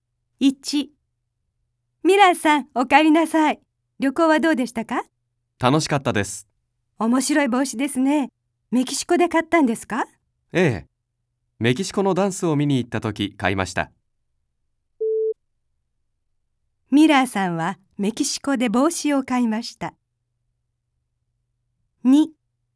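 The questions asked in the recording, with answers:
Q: ミラーさんはメキシコで帽子を買いました。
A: 正しい(○)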